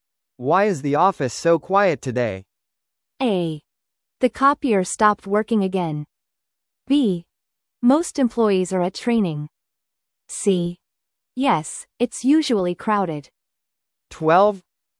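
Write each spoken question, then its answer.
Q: Why is the office so quiet today?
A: B: Most employees are at training.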